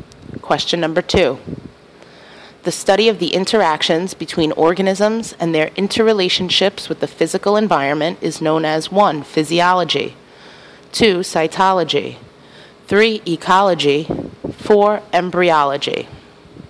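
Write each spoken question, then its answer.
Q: The study of the interactions between organisms and their interrelationships with the physical environment is known as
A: 3: Ecology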